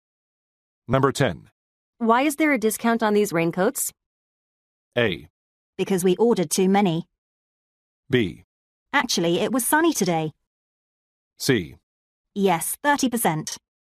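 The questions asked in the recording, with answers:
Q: Why is there a discount on these raincoats?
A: A: Because we ordered too many.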